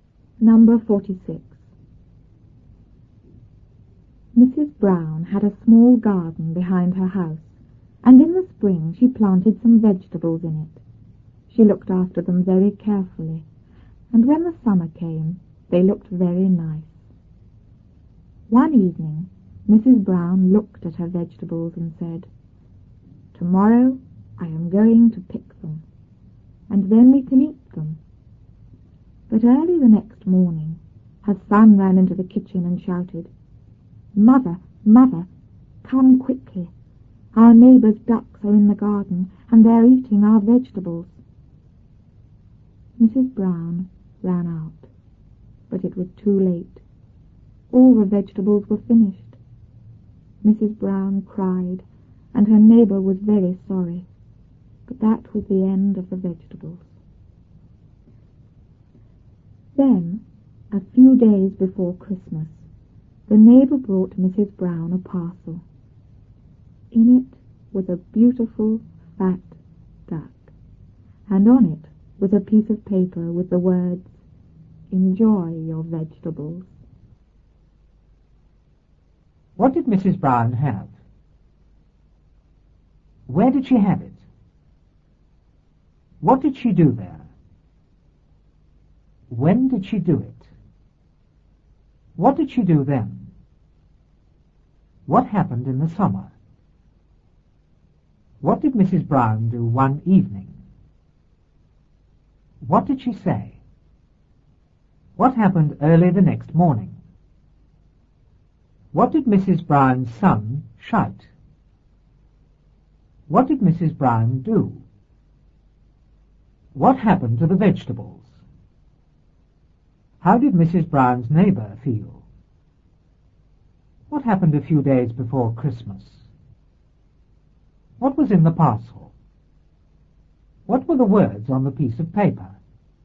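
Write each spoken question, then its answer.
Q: What did Mrs. Brown have?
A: A small garden

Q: Where did she have it?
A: Behind her house

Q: What did she do there?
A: She planted some vegetables

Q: When did she do it?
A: In the spring

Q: What did she do then?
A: She looked after them very carefully

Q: What happened in the summer?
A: The vegetables looked very nice

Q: What did Mrs. Brown do one evening?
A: She looked at her vegetables

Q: What did she say?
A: Tomorrow I am going to pick them, and then we can eat them

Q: What happened early the next morning?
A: Her son ran into the kitchen and shouted

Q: What did Mrs. Brown's son shout?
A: Mother, come quickly, the neighbor's ducks are eating our vegetables

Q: What did Mrs. Brown do?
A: She ran out

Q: What happened to the vegetables?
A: They were all finished (eaten by the ducks)

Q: How did Mrs. Brown's neighbor feel?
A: Very sorry

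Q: What happened a few days before Christmas?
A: The neighbor brought Mrs. Brown a parcel

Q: What was in the parcel?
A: A beautiful, fat duck

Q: What were the words on the piece of paper?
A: Enjoy your vegetables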